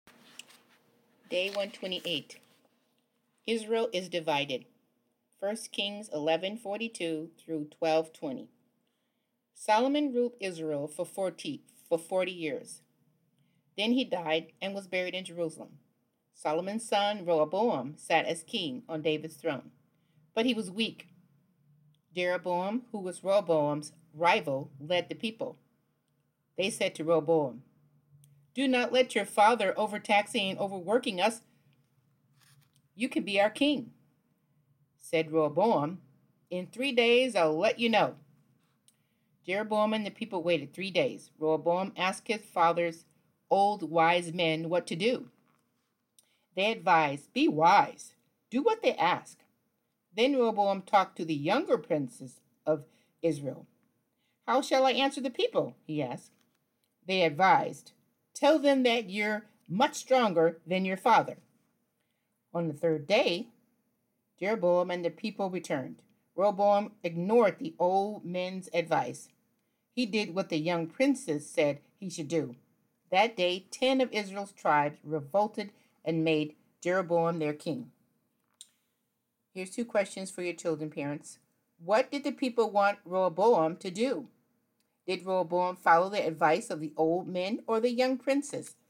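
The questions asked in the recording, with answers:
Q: What did the people want Rehoboam to do?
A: Stop overtaxing and overworking them

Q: Did Rehoboam follow the advice of the old men or the young princes?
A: The young princes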